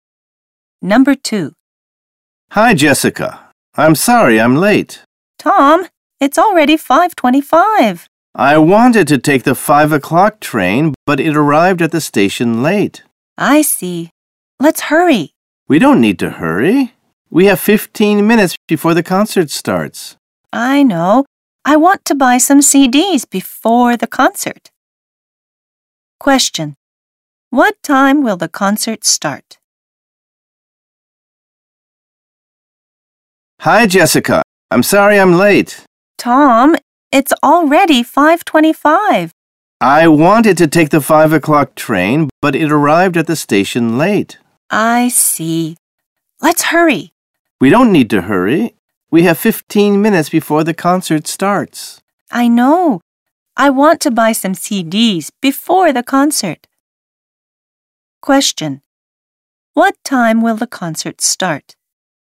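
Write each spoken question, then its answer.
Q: What time will the concert start?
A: 5:40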